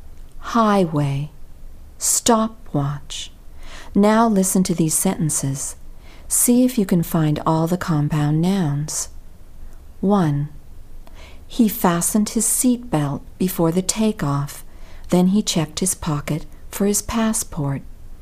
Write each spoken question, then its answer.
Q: See if you can find all the compound nouns.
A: Did you identify 3?